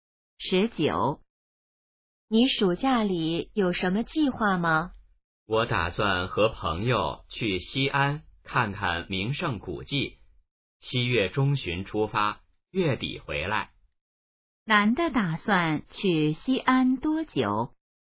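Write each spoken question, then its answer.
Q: 男的打算去西安多久?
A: 半个月左右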